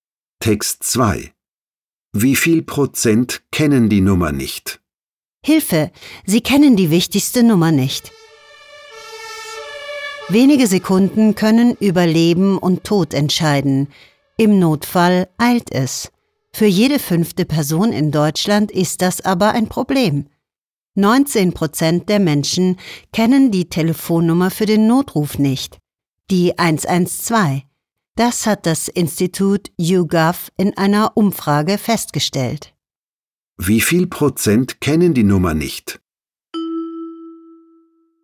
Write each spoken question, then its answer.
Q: Wie viel Prozent kennen die Nummer nicht?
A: Fast jede 5. Person kennt die 112 für den Notruf nicht.